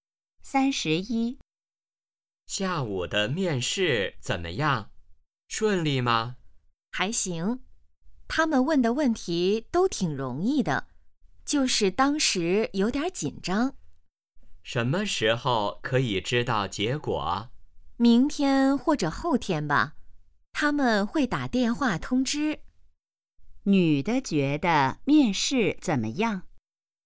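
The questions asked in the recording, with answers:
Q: 女的觉得面试怎么样?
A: 还行,问题挺容易的,但有点紧张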